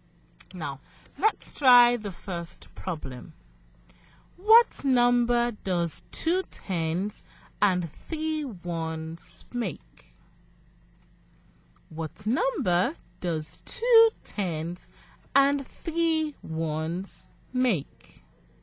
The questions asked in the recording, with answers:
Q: What number does 2 tens and 3 ones make?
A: So, 2 tens and 3 ones makes 23.